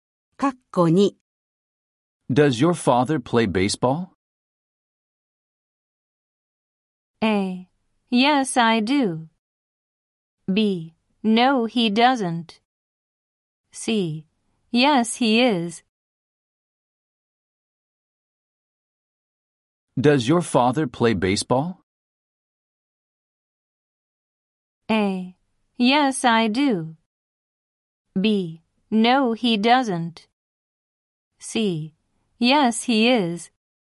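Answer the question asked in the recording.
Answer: B: No, he doesn't.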